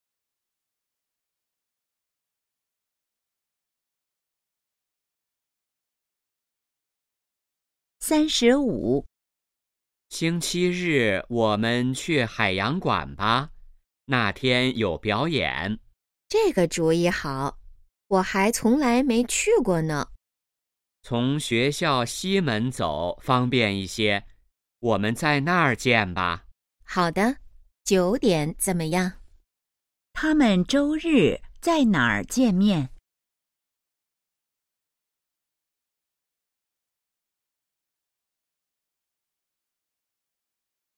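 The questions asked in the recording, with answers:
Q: 他们周日在哪儿见面?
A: 学校西门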